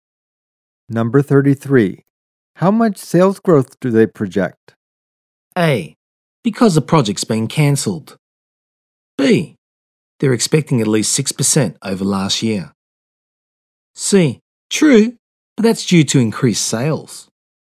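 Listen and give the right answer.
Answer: B: They're expecting at least 6% over last year.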